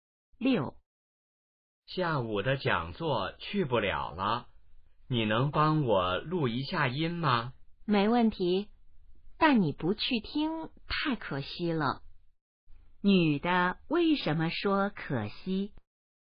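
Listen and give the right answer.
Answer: 男的不能去听讲座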